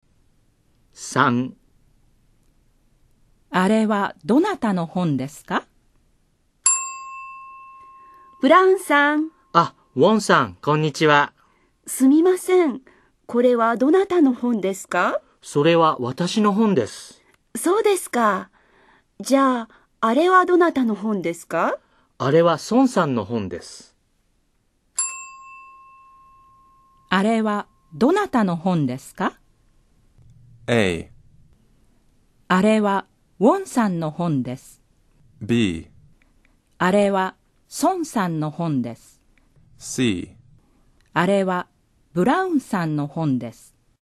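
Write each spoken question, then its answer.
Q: あれはどなたの本ですか?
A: B: あれは孫さんの本です。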